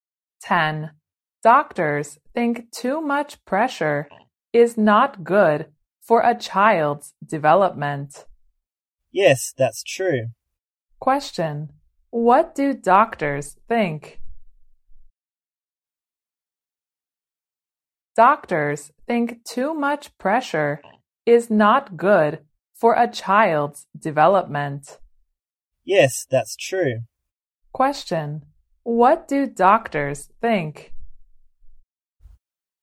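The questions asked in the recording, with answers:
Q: what do doctors think?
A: Too much pressure is not good for a child's development.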